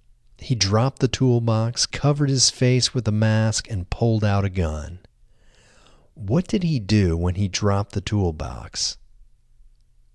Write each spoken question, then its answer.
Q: What did he do when he dropped the toolbox?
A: When he dropped the toolbox, he covered his face with a mask and pulled out a gun.